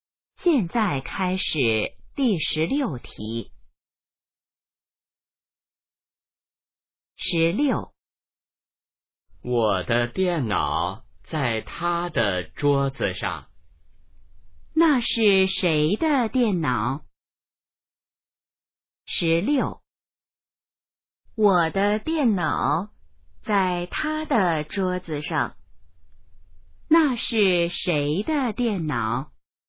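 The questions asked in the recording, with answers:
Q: 那是谁的电脑?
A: 我的(说话人的)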